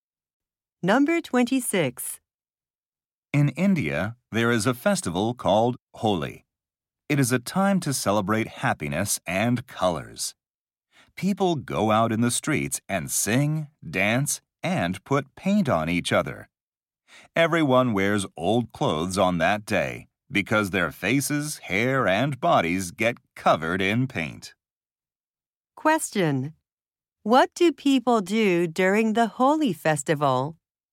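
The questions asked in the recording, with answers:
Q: What do people do during the Holi festival?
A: Put paint on each other.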